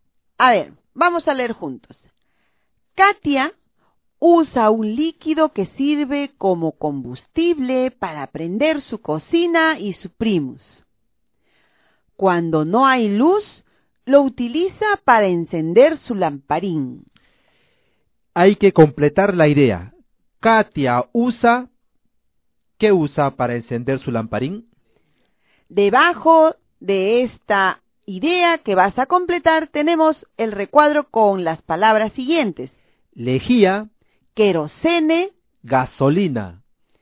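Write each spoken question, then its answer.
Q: Katia usa... ¿Qué usa para encender su lamparín?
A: Querosene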